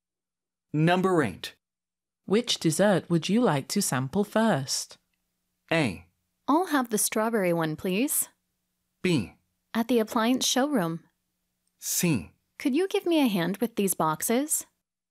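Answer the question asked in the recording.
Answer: A: I'll have the strawberry one, please.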